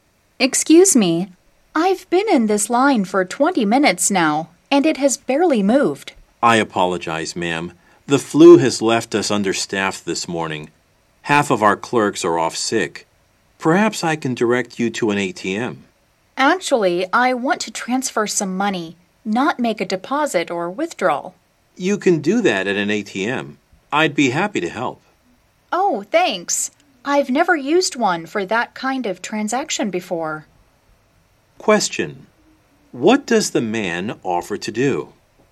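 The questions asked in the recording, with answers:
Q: What does the man offer to do?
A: Help her transfer money at an ATM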